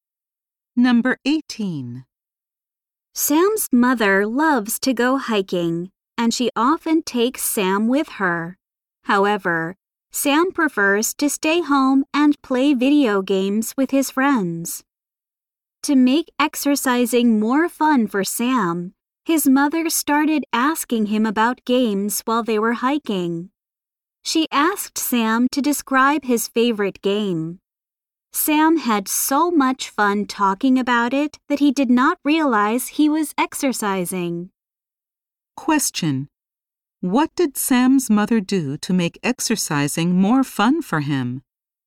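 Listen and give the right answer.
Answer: She asked him about his games while they were hiking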